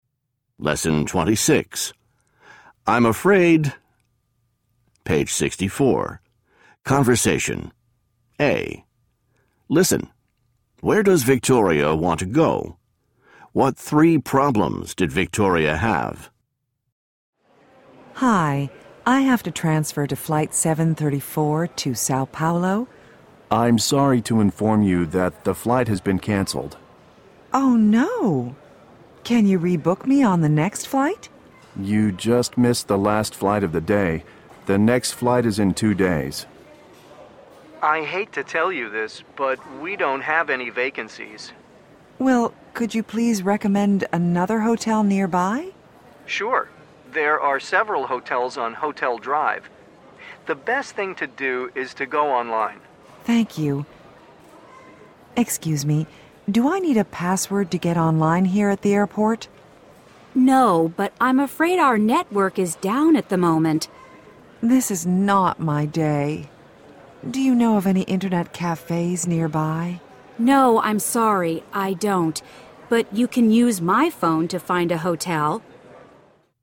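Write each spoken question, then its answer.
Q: Where does Victoria want to go?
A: Sao Paulo

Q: What three problems did Victoria have?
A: Her flight was canceled, the hotel had no vacancies, and the airport network was down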